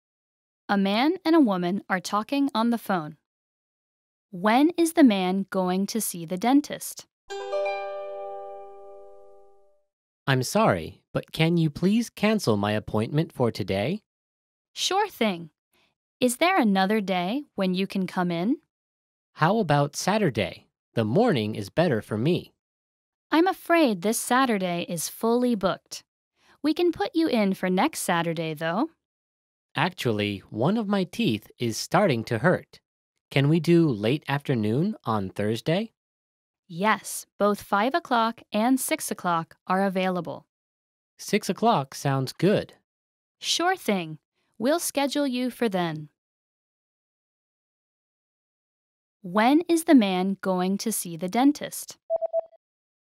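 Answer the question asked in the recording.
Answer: Thursday at 6 o'clock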